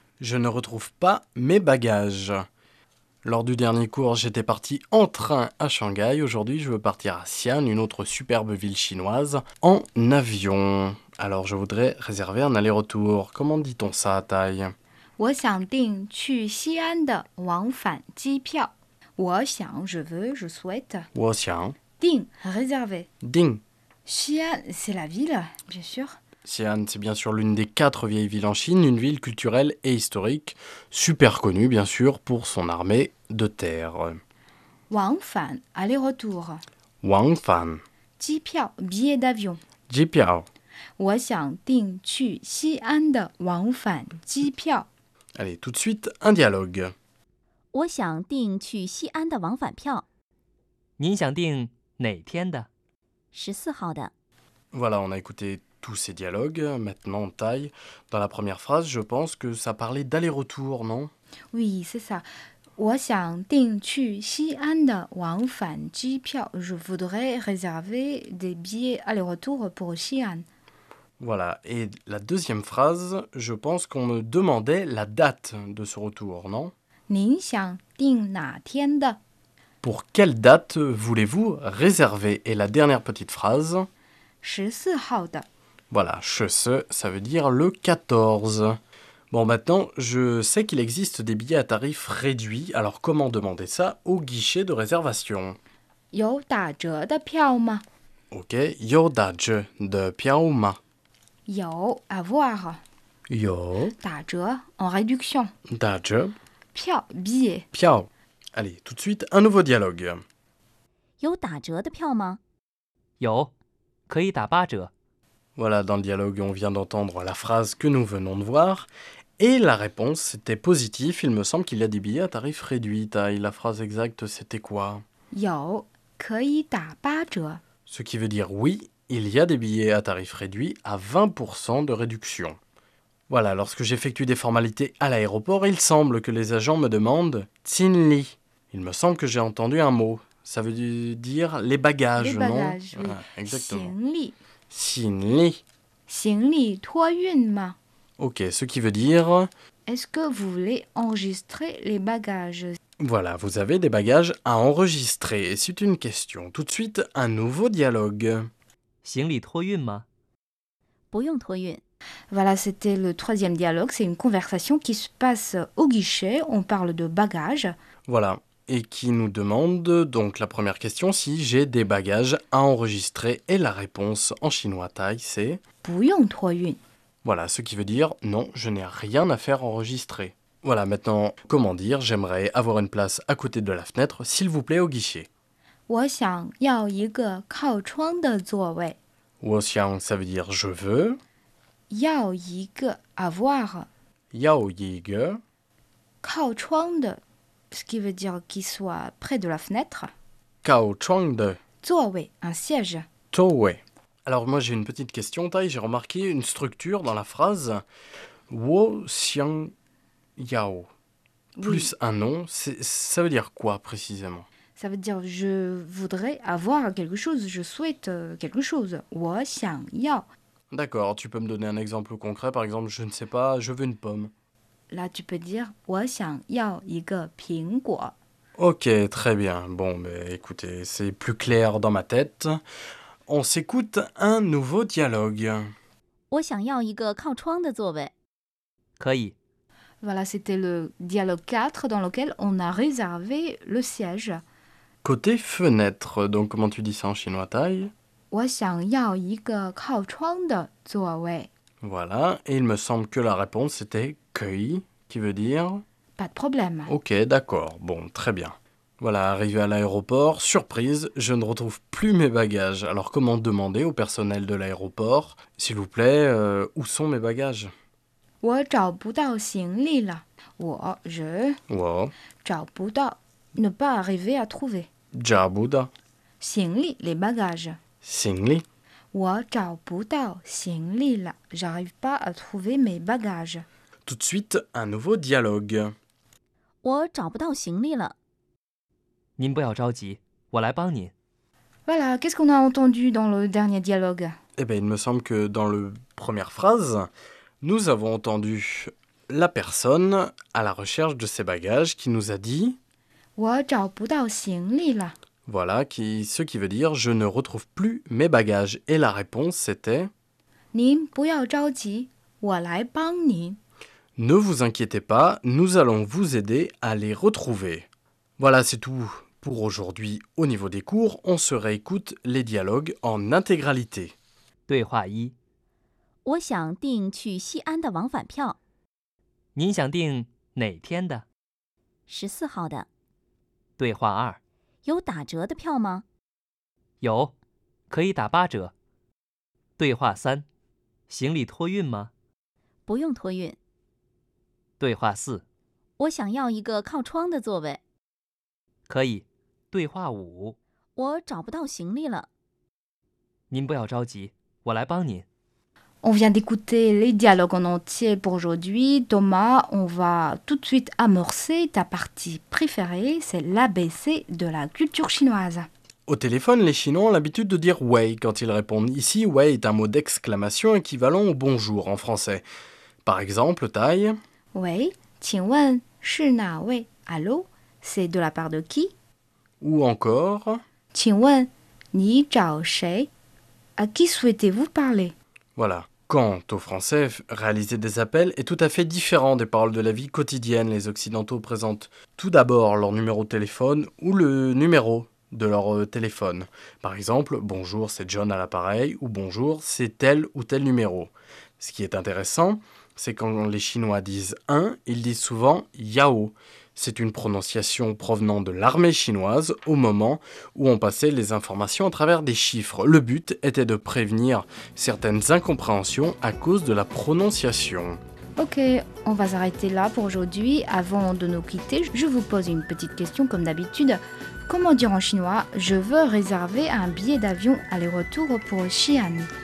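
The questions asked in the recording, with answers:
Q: Comment dire en chinois « je veux réserver un billet d'avion aller-retour pour Xi'an » ?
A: 我想订去西安的往返机票。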